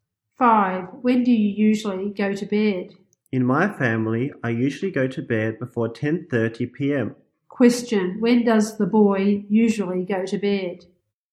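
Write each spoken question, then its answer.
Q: Question, when does the boy usually go to bed?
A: Before 10:30 p.m.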